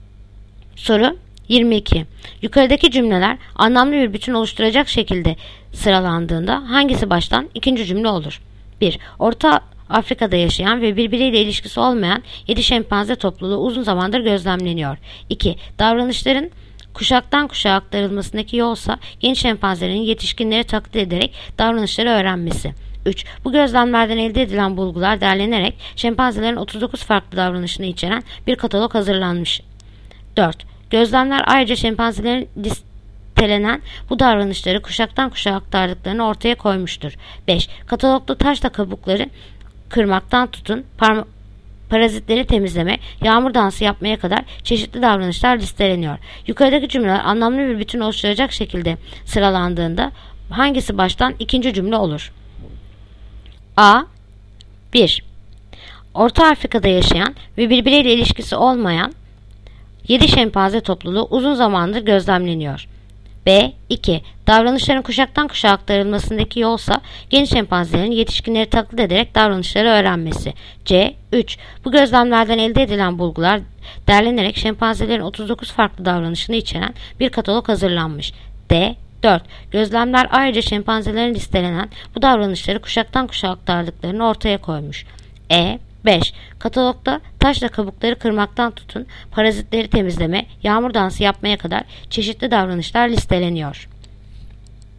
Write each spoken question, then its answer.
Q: Yukarıdaki cümleler anlamlı bir bütün oluşturacak şekilde sıralandığında hangisi baştan ikinci cümle olur?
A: Yanıt: Ceyhan. 3. Bu gözlemlerden elde edilen bulgular derlenerek şempanzelerin 39 farklı davranışı içeren bir katalog hazırlanmış.